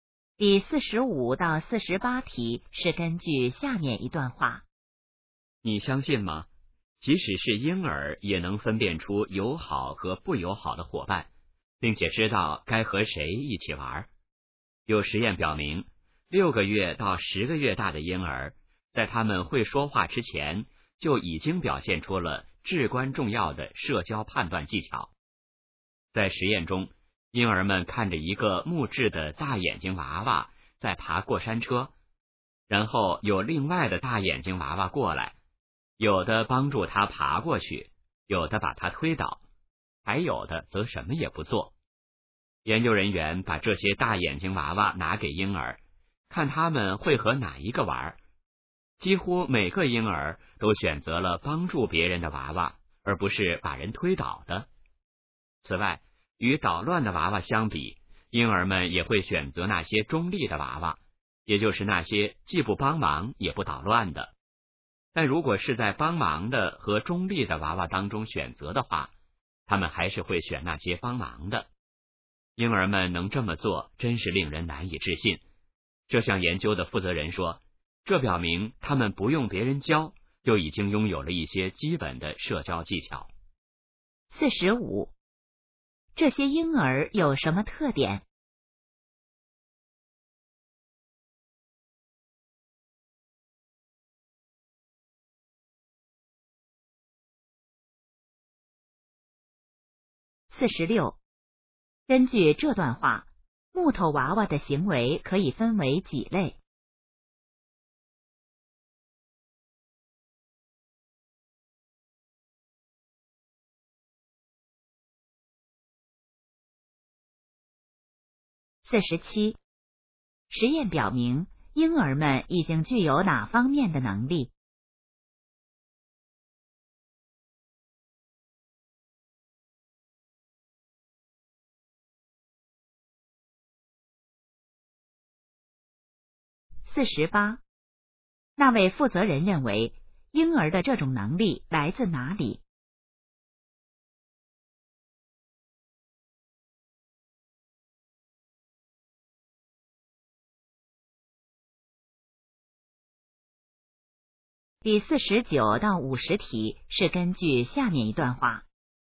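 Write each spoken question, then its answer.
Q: 根据这段话,木头娃娃的行为可以分为几类?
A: 三类

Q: 实验表明,婴儿们已经具有哪方面的能力?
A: 社交判断能力

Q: 那位负责人认为,婴儿的这种能力来自哪里?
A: 天生的,不用别人教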